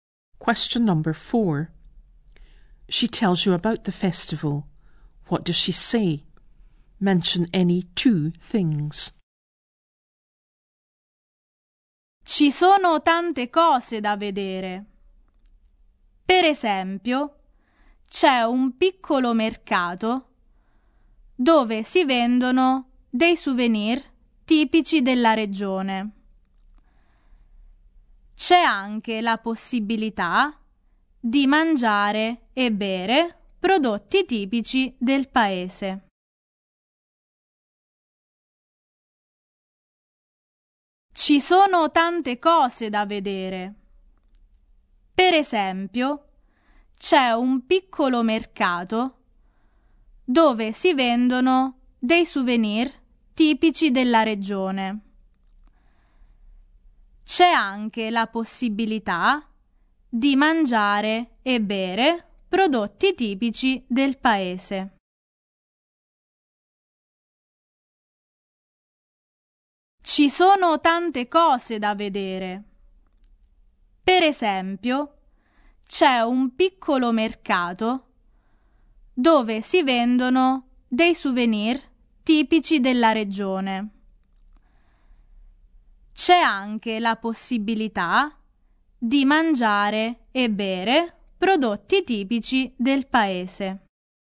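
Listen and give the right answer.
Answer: There are lots of things to see; a small market selling typical local souvenirs; you can eat and drink local products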